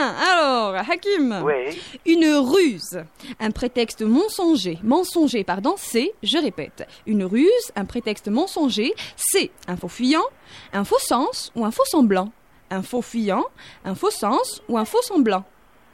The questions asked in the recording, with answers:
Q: une ruse, un prétexte mensonger, c'est un faux fuyant, un faux sens ou un faux semblant.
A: Un faux semblant, c'est une bonne réponse.